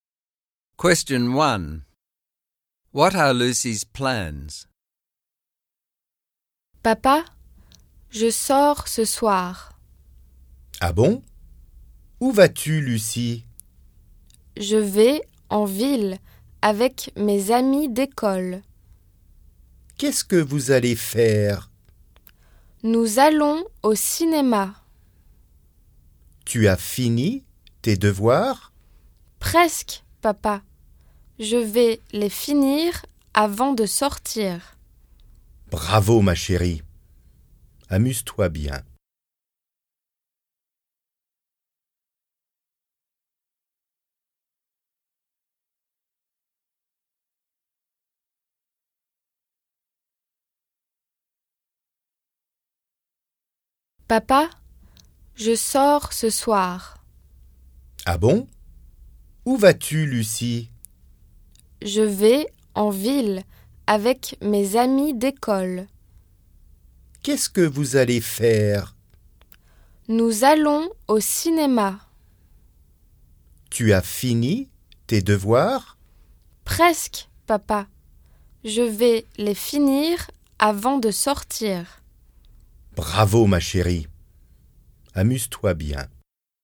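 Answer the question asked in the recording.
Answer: To go into town with school friends to the cinema, after finishing her homework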